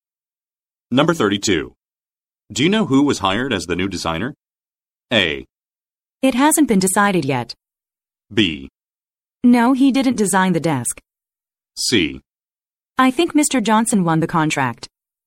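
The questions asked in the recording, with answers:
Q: Do you know who was hired as the new designer?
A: A: It hasn't been decided yet.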